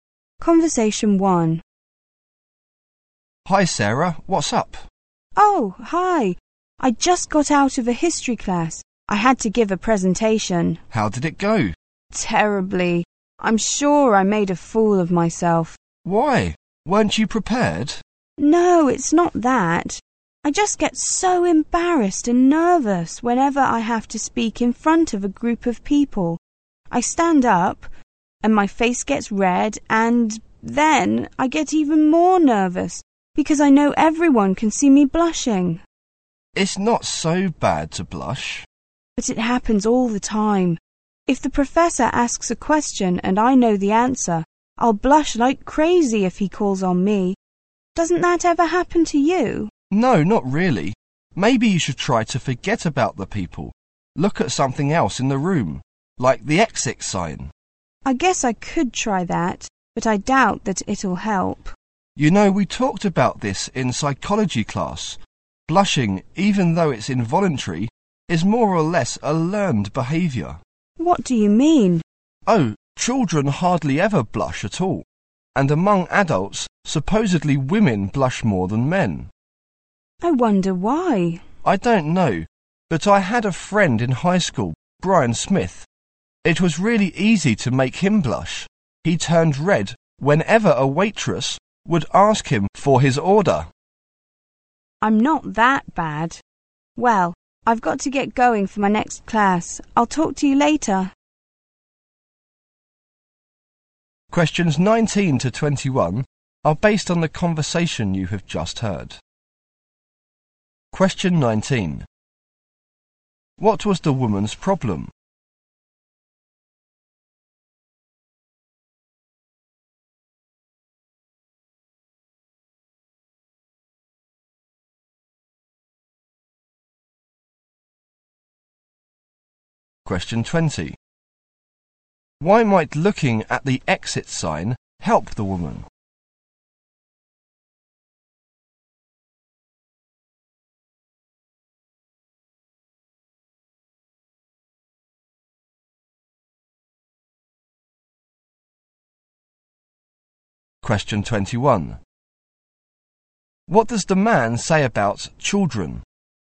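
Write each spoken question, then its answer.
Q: What was the woman's problem?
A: She gets nervous and blushes when she speaks in front of a group.

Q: Why might looking at the exit sign help the woman?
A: It could help her forget about the people.

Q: What does the man say about children?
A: They hardly ever blush.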